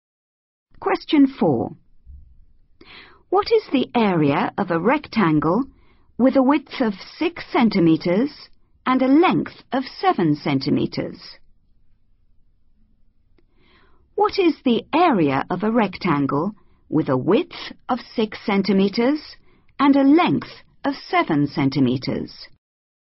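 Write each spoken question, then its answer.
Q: What is the area of a rectangle with a width of 6 centimeters and a length of 7 centimeters?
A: 42 cm2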